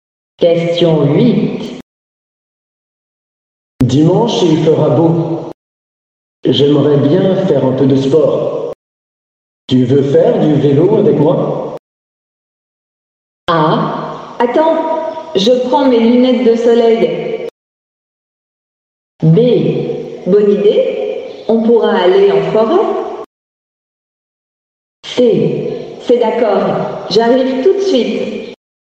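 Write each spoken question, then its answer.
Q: Tu veux faire du vélo avec moi?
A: B: Bonne idée, on pourra aller en forêt.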